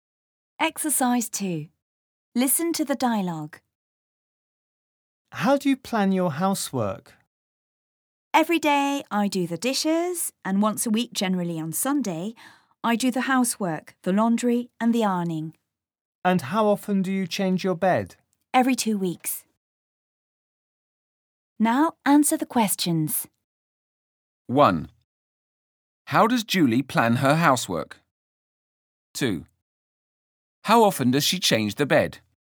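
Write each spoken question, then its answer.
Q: How does Julie plan her housework?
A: She does the dishes every day, and once a week, usually on Sunday, she does the housework, laundry and ironing.

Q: How often does she change the bed?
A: Every 2 weeks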